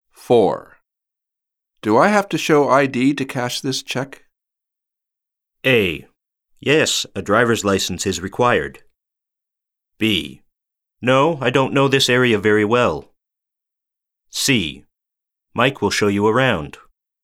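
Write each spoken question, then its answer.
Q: Do I have to show ID to cash this check?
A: A: Yes, a driver's license is required.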